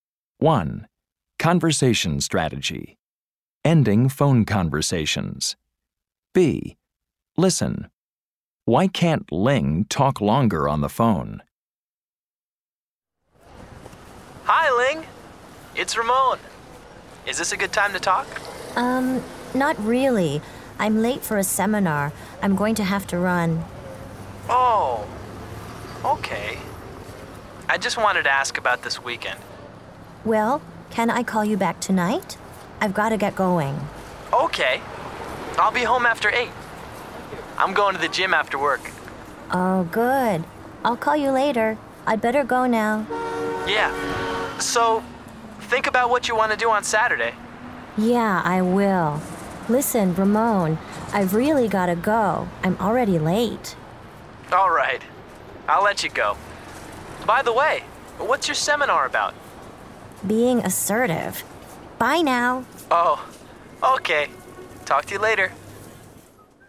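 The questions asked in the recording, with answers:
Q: Why can't Ling talk longer on the phone?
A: She's late for a seminar.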